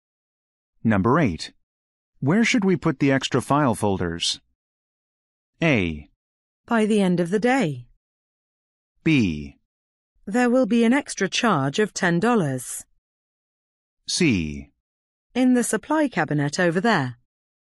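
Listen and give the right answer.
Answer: C: In the supply cabinet over there.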